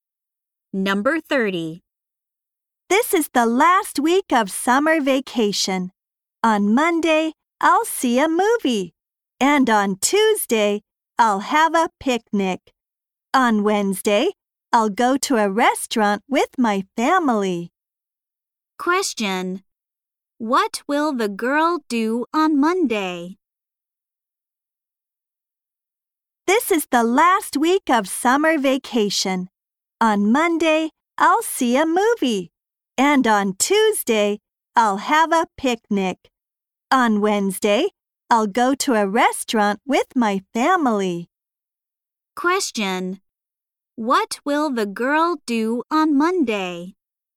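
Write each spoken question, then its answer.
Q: What will the girl do on Monday?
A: See a movie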